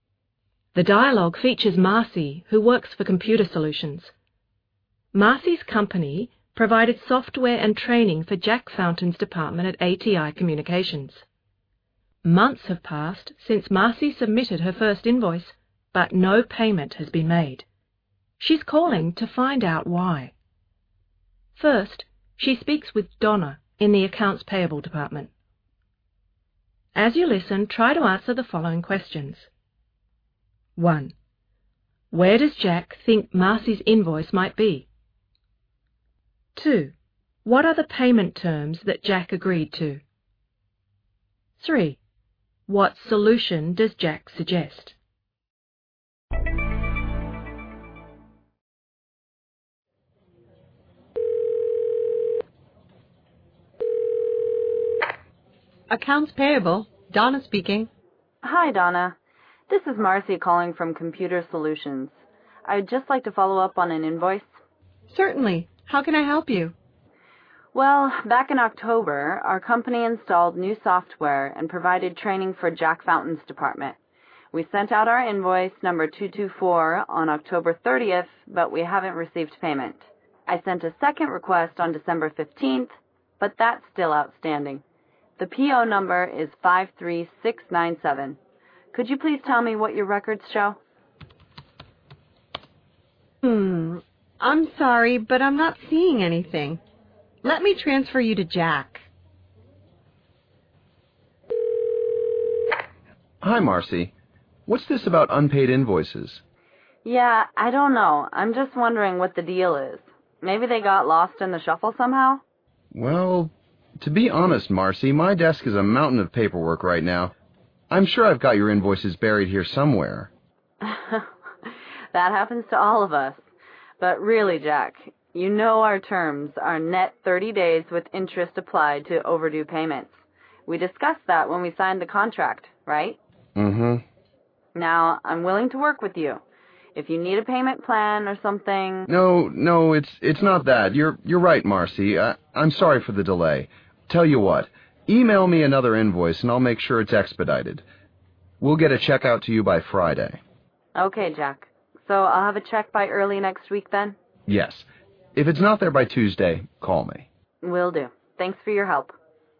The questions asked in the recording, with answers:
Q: Where does Jack think Marcy's invoice might be?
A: We can imagine that Marcy's invoice is buried under piles of paper on Jack's desk.

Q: What solution does Jack suggest?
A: In this case, Jack will expedite, or speed up, the payment process if Marcy emails him another invoice.